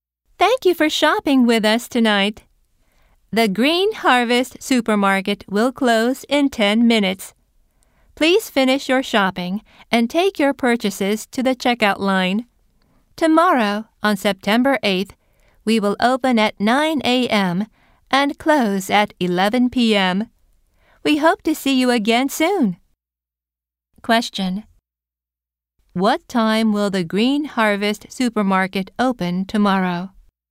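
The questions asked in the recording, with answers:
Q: What time will the Green Harvest Supermarket open tomorrow?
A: At 9 a.m.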